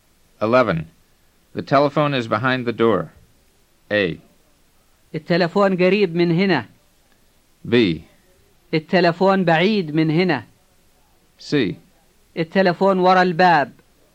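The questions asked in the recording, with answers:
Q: The telephone is behind the door.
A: C: التلفون وراء الباب.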